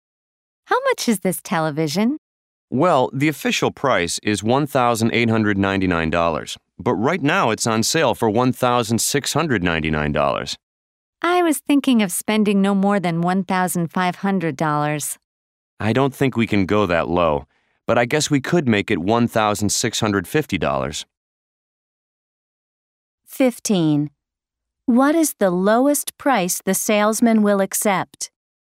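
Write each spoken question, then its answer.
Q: What is the lowest price the salesman will accept?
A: $1,650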